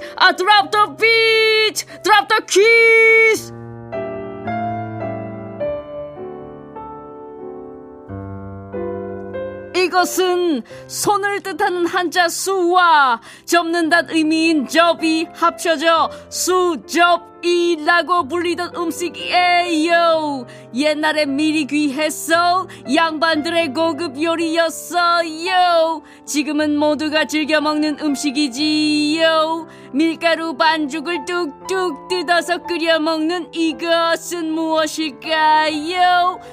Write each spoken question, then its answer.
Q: 밀가루 반죽을 뚝뚝 뜯어서 끓여 먹는 이것은 무엇일까요?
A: 정답 수제비입니다.